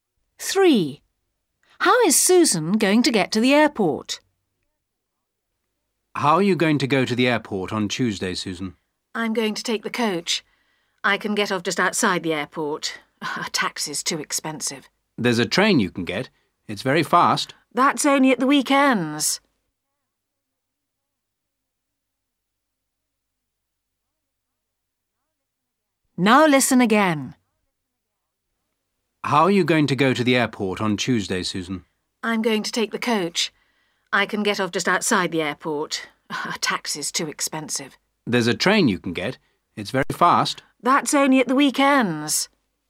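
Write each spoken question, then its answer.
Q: How is Susan going to get to the airport?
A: By coach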